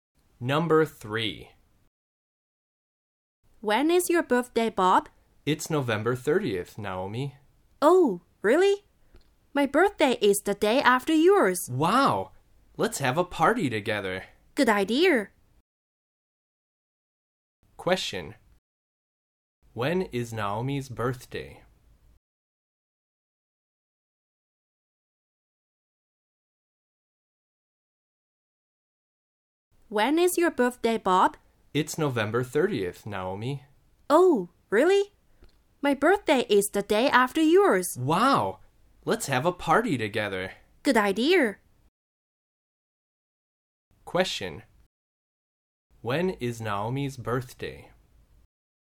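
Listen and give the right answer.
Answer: December 1st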